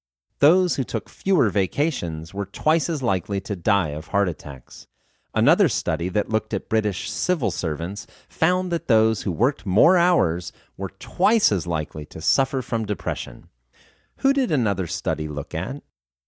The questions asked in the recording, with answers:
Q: Who did another study look at?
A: Another study looked at British civil servants.